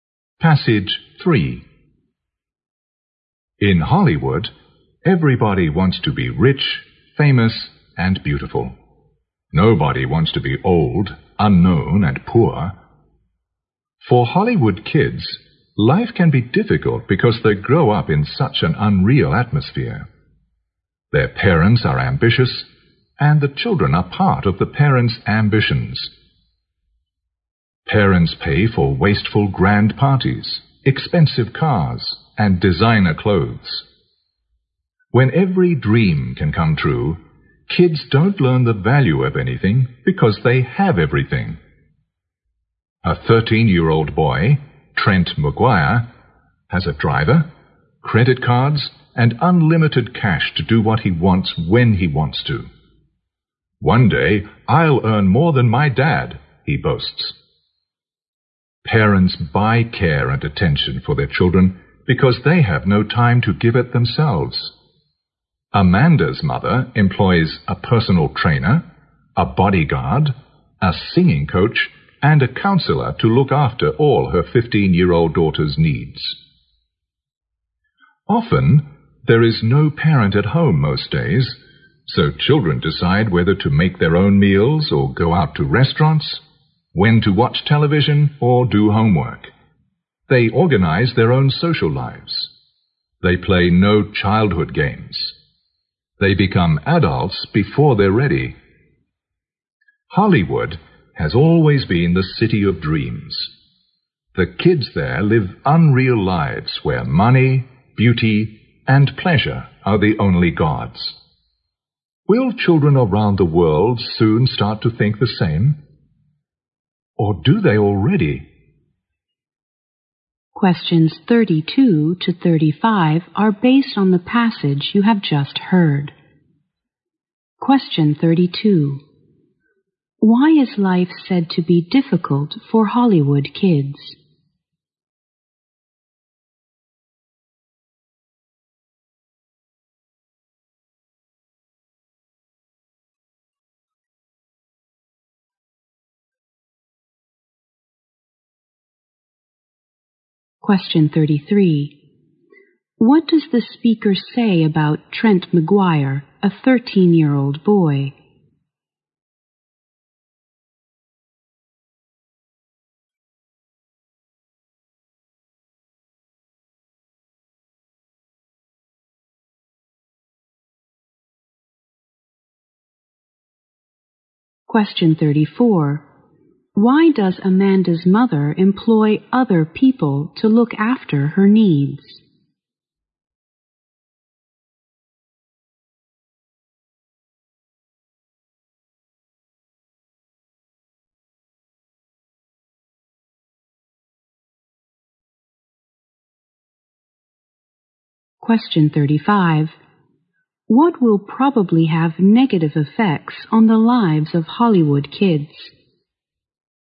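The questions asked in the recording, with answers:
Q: Why is life said to be difficult for Hollywood kids?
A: They grow up in such an unreal atmosphere.

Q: What does the speaker say about Trent McGuire, a 13-year-old boy?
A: He has a driver, credit cards and unlimited cash, and boasts he will earn more than his dad.

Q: Why does Amanda's mother employ other people to look after her needs?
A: She has no time to give care and attention herself.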